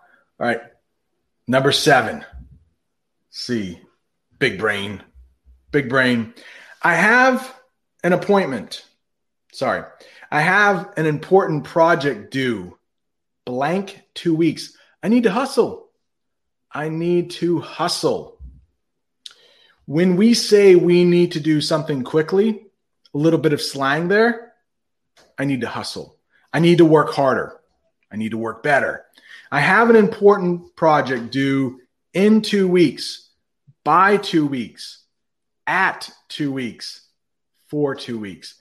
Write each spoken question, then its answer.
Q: I have an important project due.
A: That correct answer is in two weeks.